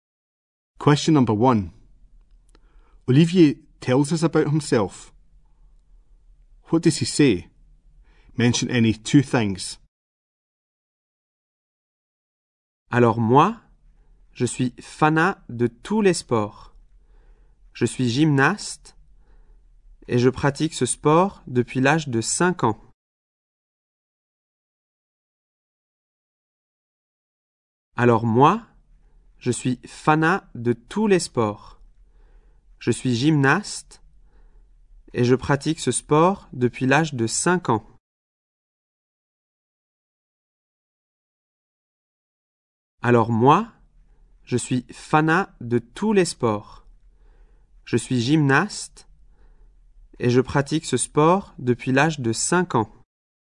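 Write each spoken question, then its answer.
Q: What does he say? Mention any two things.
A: He is a fan of all sports; he is a gymnast; he has done gymnastics since age 5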